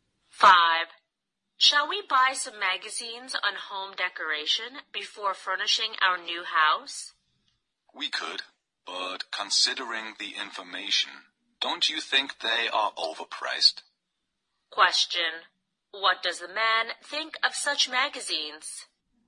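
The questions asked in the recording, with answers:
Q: What does the man think of such magazines?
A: They are overpriced.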